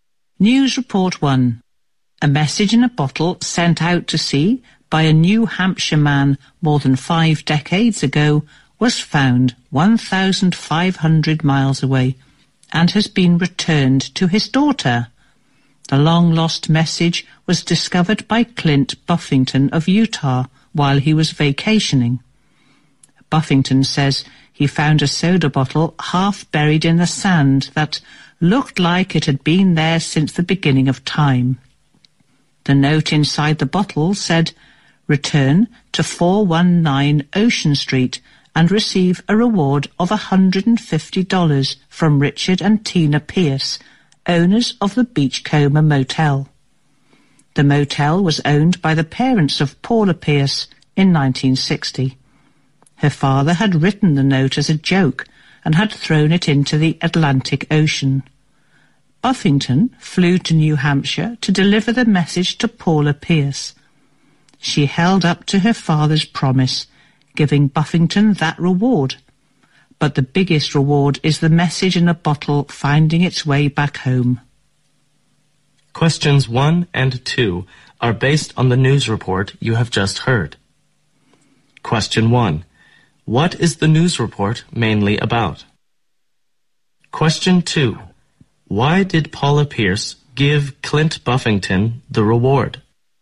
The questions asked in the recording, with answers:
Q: What is the news report mainly about?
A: A message bottle was discovered 50 years after it was sent out.

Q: Why did Paula Pierce give Clint Buffington the reward?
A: And the daughter, Paula Pierce, kept the promise and gave the reward to this man.